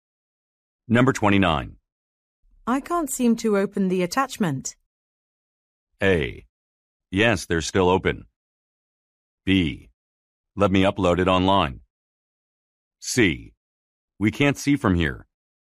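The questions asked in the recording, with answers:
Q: I can't seem to open the attachment.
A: B: Let me upload it online.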